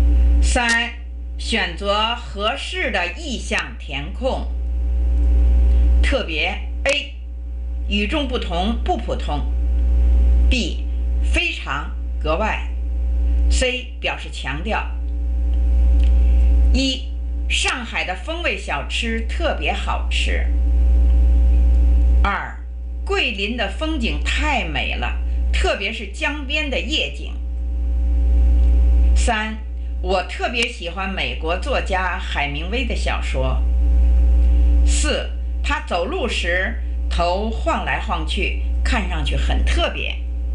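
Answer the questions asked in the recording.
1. B: 非常格外
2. C: 表示强调
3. B: 非常格外
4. A: 与众不同不普通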